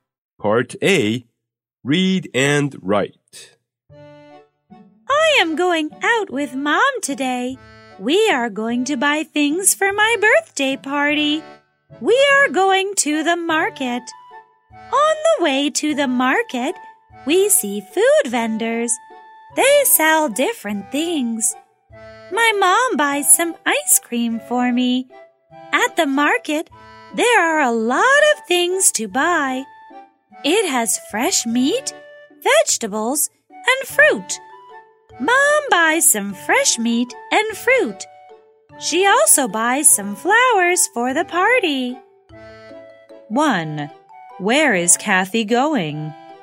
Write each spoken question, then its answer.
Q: Where is Kathy going?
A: She is going to the market.